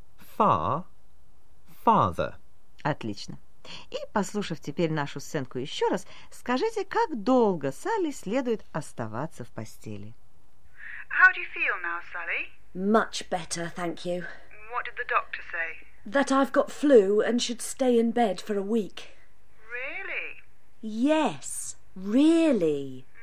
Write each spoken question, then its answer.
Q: Отлично. И, послушав теперь нашу сценку еще раз, скажите, как долго Салли следует оставаться в постели?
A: A week. She should stay in bed for a week.